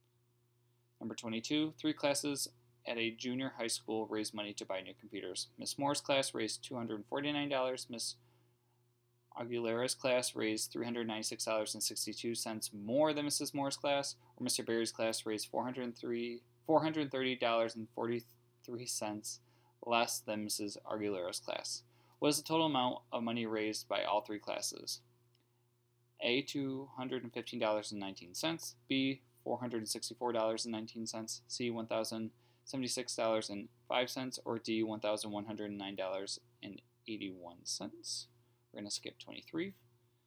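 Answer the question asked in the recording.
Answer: D: $1,109.81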